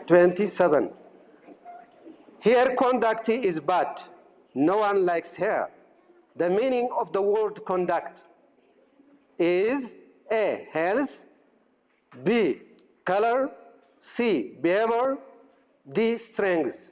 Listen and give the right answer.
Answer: C, behavior.